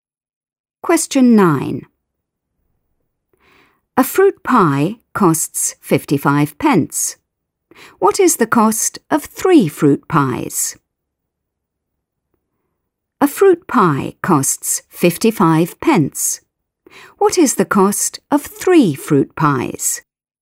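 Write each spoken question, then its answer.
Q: What is the cost of 3 fruit pies?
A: £1.65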